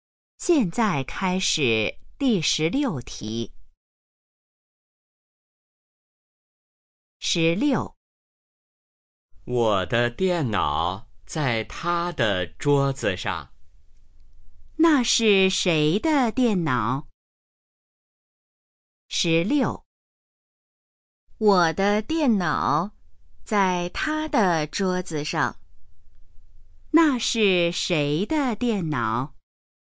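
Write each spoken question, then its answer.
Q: 那是谁的电脑?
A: 我的(说话人的)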